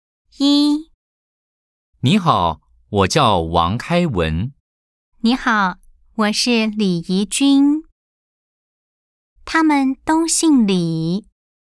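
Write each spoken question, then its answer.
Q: 他们都姓李。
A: 错 (X)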